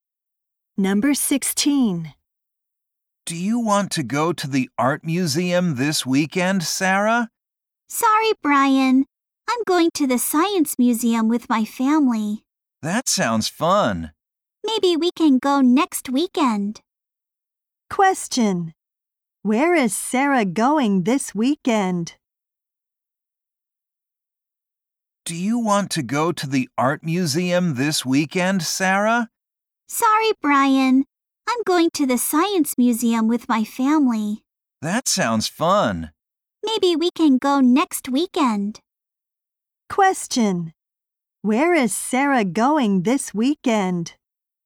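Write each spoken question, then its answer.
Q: Where is Sarah going this weekend?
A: To the science museum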